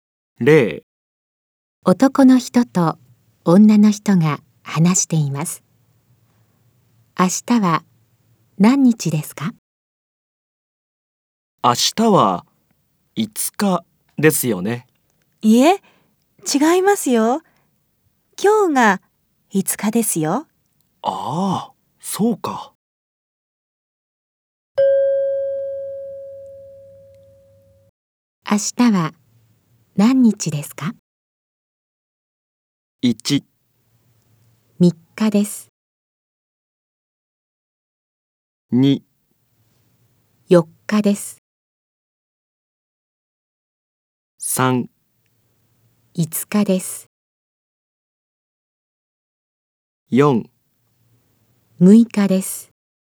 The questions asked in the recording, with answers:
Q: 明日は何日ですか?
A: 正しい答えは4です。